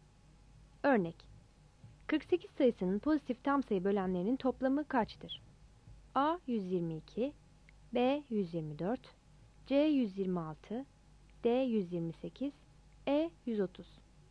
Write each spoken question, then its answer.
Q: Örnek: 48 sayısının pozitif tam sayı bölenlerinin toplamı kaçtır?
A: Yanıt B'dir.